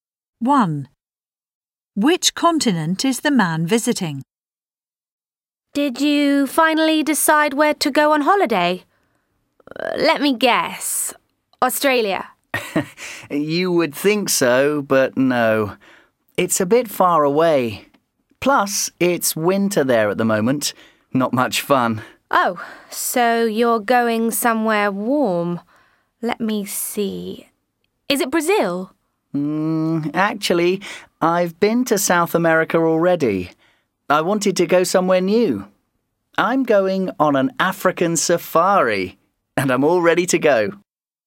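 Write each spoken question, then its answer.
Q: Which continent is the man visiting?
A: Africa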